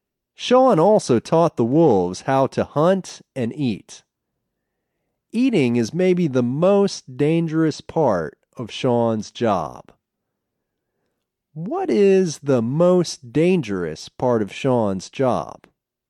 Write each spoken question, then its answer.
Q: What is the most dangerous part of Sean's job?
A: Eating is the most dangerous part of Sean's job.